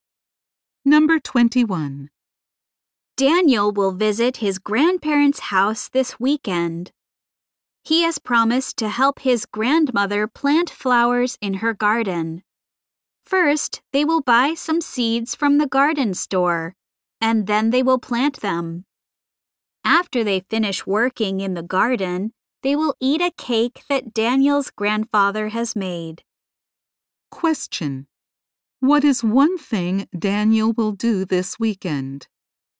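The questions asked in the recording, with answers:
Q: What is one thing Daniel will do this weekend?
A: Help his grandmother plant flowers in her garden.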